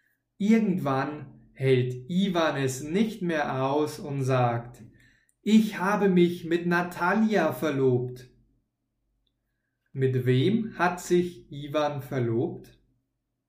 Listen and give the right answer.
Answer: Mit Natalia. Er hat sich mit Natalia verlobt.